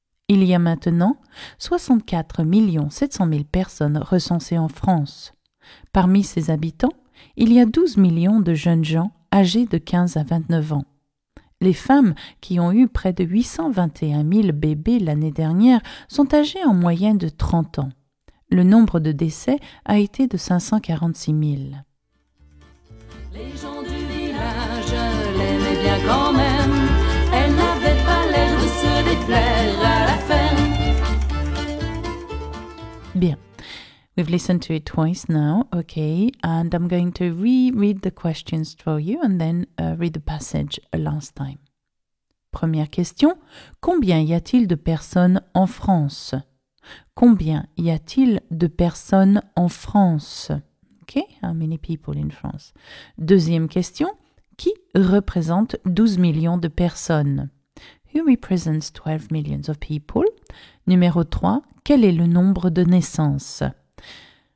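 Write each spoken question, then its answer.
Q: combien y a-t-il de personnes en France?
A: 64 700 000

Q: qui représente 12 millions de personnes?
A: les jeunes gens âgés de 15 à 29 ans

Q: quel est le nombre de naissances?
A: près de 821 000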